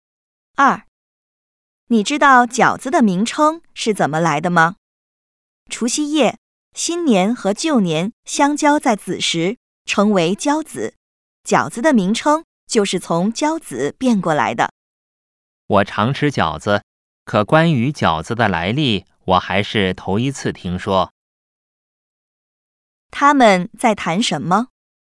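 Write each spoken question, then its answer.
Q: 他们在谈什么?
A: 饺子名称的来历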